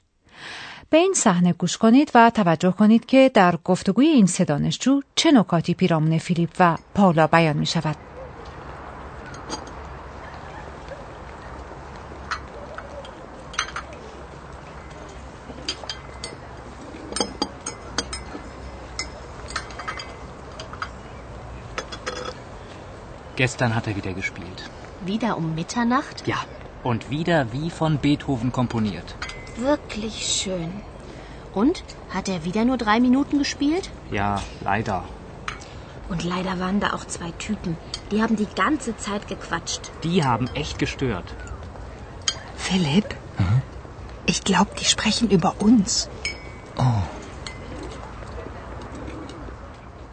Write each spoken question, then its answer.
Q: توجه کنید که در گفتگوی این سه دانشجو چه نکاتی پیرامون فیلیپ و پالا بیان می شود.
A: نکاتی که این دانشجویان درباره فیلیپ و پاولا بیان می کنند چندان مثبت نیست.